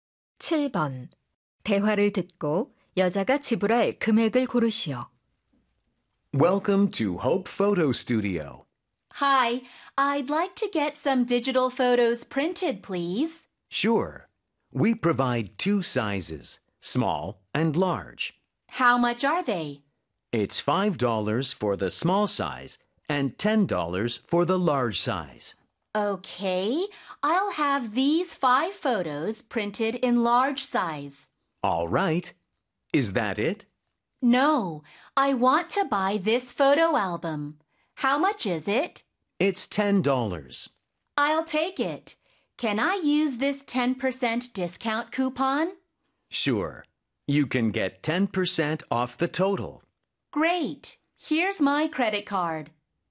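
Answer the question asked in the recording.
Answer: $54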